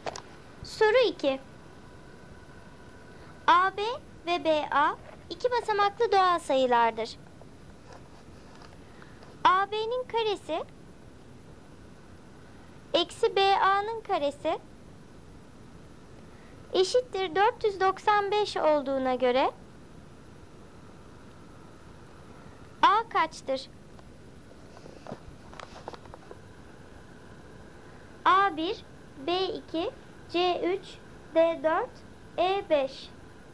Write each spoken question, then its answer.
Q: A kaçtır?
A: Doğru cevap C3.